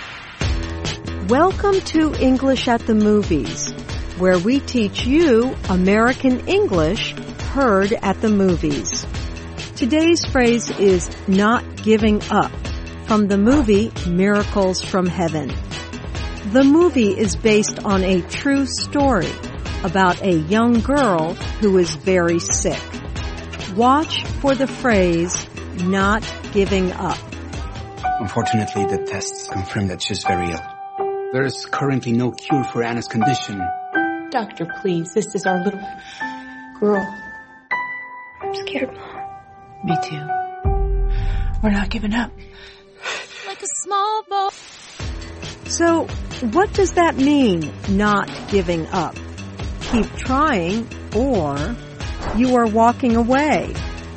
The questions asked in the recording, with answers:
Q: So, what does that mean, not giving up?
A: Not giving up means to keep trying.